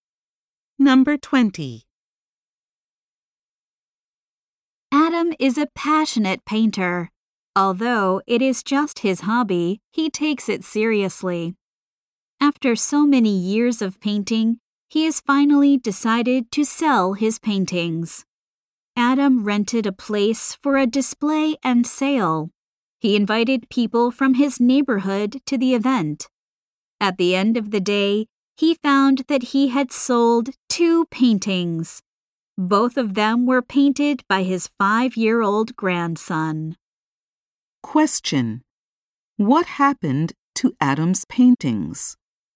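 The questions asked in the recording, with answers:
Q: What happened to Adam's paintings?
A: None sold; the two sold were his grandson's.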